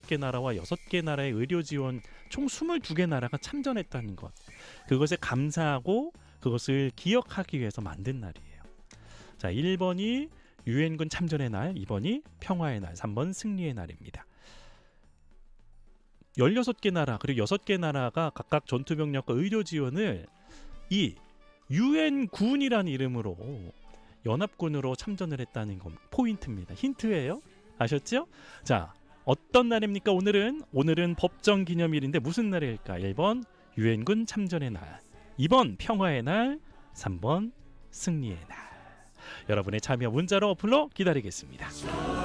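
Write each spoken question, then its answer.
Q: 자, 어떤 날입니까? 오늘은 법정 기념일인데 무슨 날일까?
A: 1번: 유엔군 참전의 날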